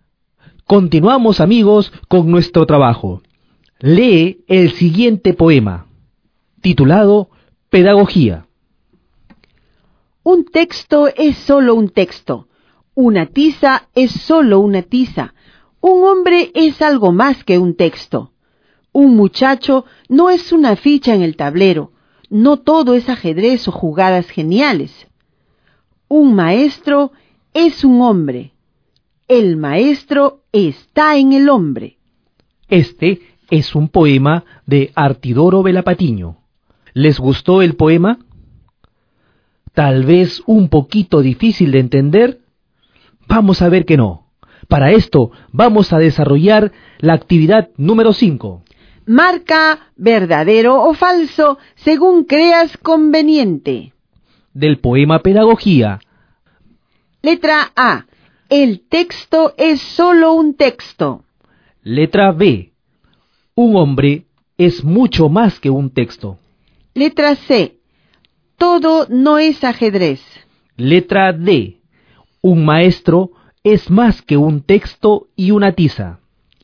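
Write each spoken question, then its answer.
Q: El texto es solo un texto.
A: Verdadero

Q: Un hombre es mucho más que un texto.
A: Verdadero

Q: Todo no es ajedrez.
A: Verdadero

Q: El maestro está en el hombre.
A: Verdadero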